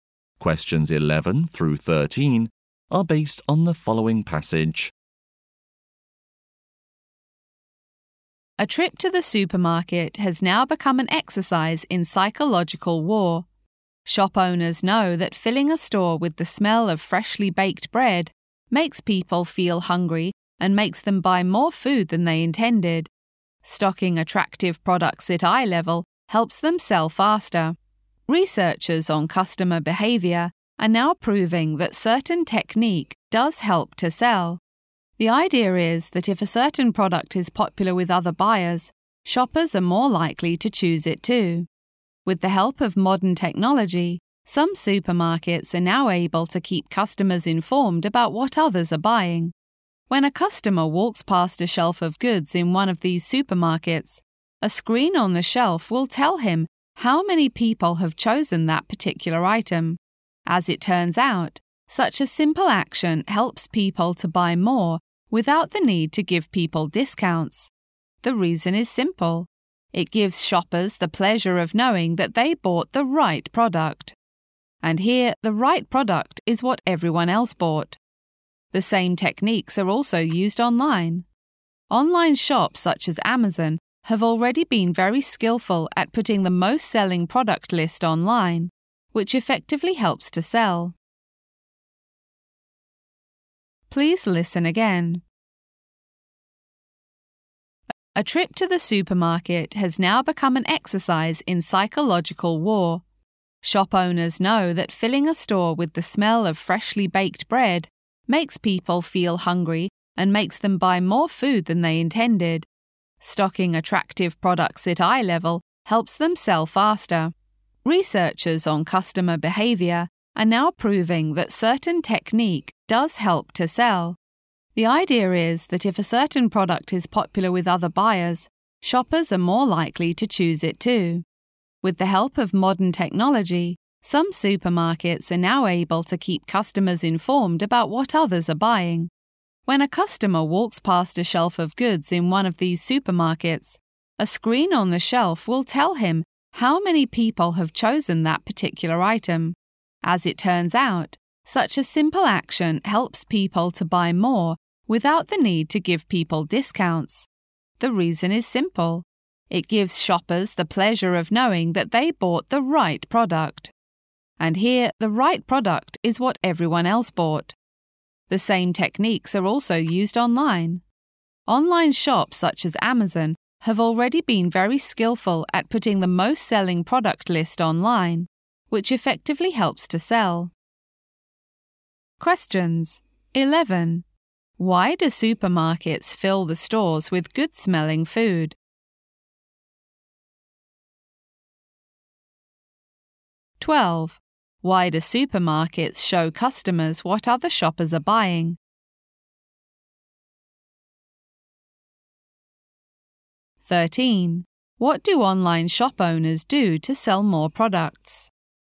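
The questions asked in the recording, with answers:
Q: Why do supermarkets fill the stores with good-smelling food?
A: To make people hungry so they buy more food

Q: Why do supermarkets show customers what other shoppers are buying?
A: Shoppers are more likely to choose popular products, so they buy more

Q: What do online shop owners do to sell more products?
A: Put the best-selling product list online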